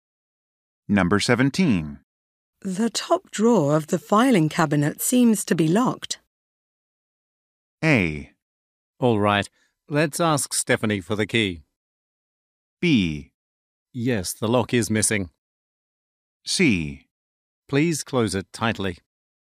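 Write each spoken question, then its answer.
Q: The top drawer of the filing cabinet seems to be locked.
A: A: All right, let's ask Stephanie for the key.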